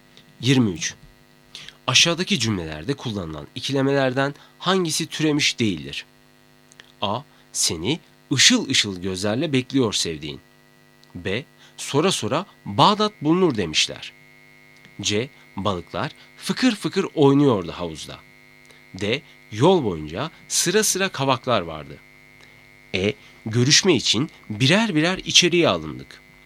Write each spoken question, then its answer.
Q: Aşağıdaki cümlelerde kullanılan ikilemelerden hangisi türemiş değildir?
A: Doğru cevap D. Yol boyunca sıra sıra kavaklar vardı.